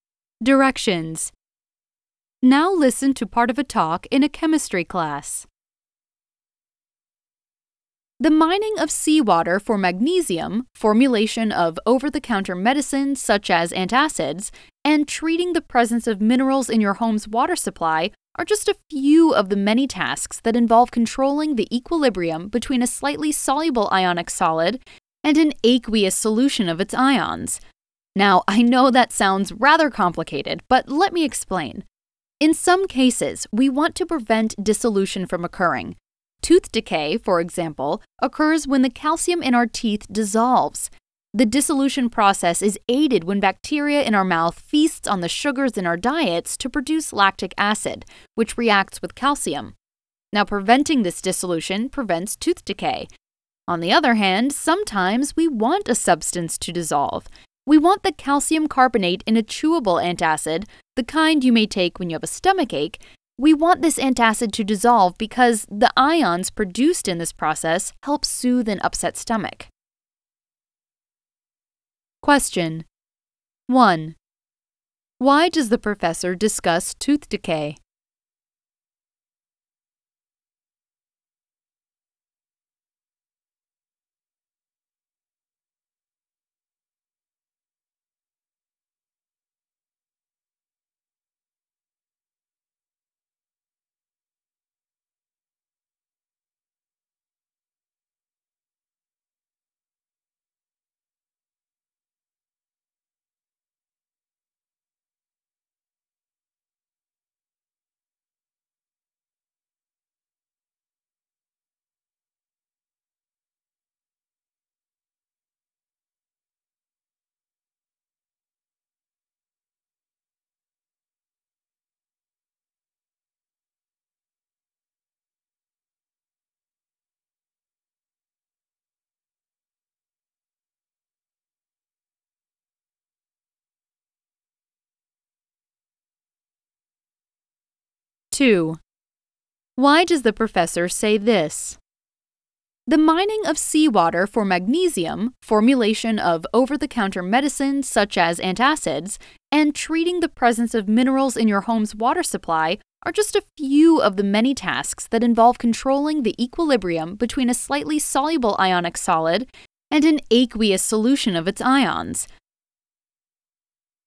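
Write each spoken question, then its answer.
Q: Why does the professor discuss tooth decay?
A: As an example of a case where we want to prevent dissolution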